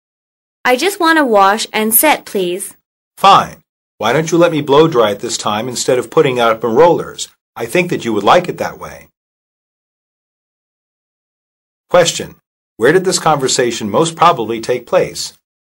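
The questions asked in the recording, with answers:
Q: Where did this conversation most probably take place?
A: At a beauty salon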